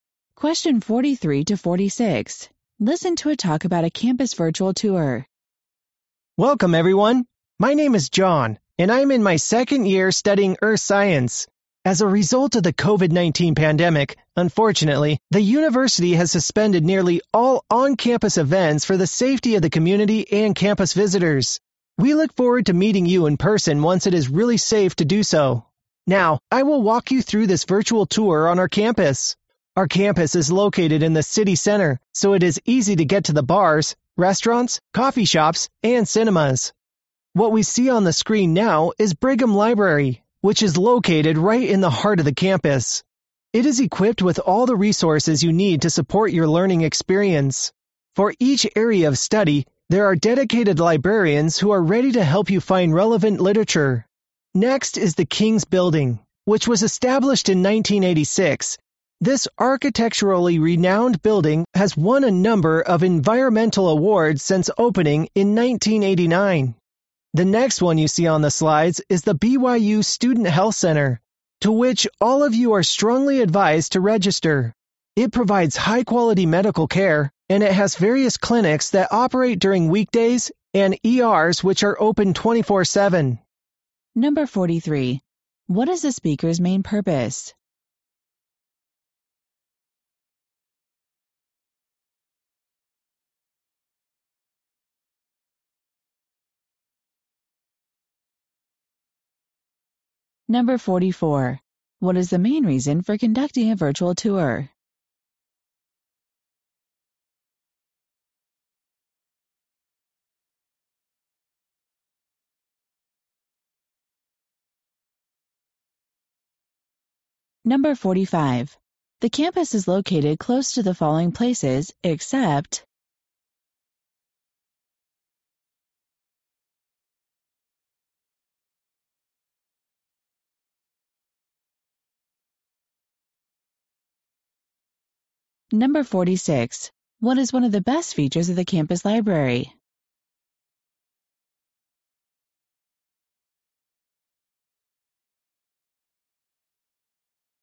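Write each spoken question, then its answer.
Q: What is the speaker's main purpose?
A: To give a virtual tour of the campus

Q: What is the main reason for conducting a virtual tour?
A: On-campus events were suspended because of the COVID-19 pandemic

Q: What is one of the best features of the campus library?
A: Dedicated librarians for each area of study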